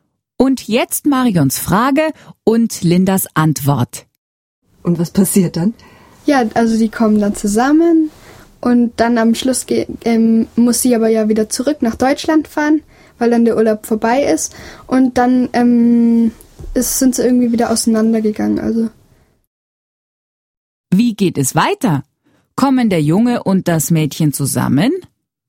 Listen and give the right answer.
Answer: Ja, sie kommen zusammen. Aber nur bis ihr Urlaub zu Ende ist.